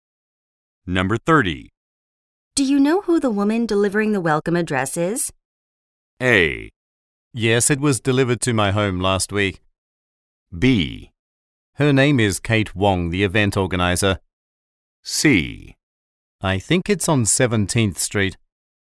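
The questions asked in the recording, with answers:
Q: Do you know who the woman delivering the welcome address is?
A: B: Her name is Kate Wong, the event organizer.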